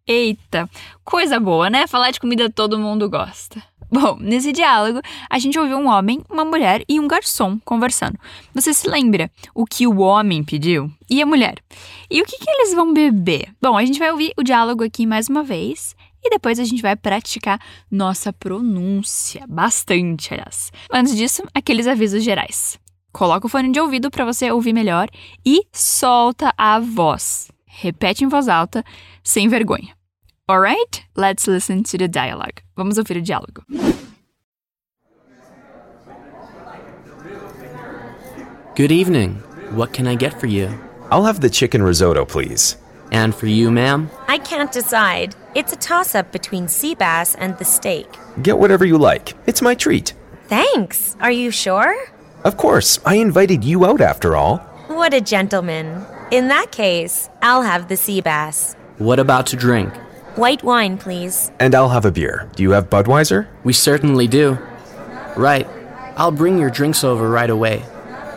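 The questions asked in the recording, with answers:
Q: Você se lembra o que o homem pediu?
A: Risoto de frango (chicken risotto)

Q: E a mulher?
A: Robalo (sea bass)

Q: E o que, que eles vão beber?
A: Vinho branco (ela) e cerveja Budweiser (ele)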